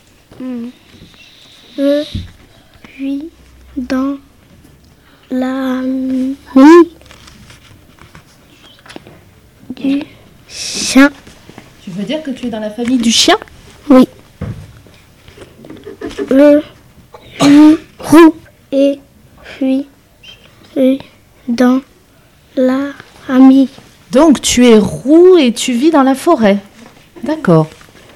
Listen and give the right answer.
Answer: Je suis le renard.